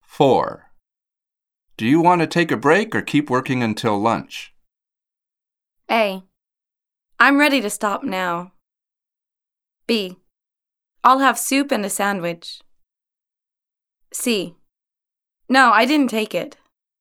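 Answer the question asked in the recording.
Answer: A: I'm ready to stop now.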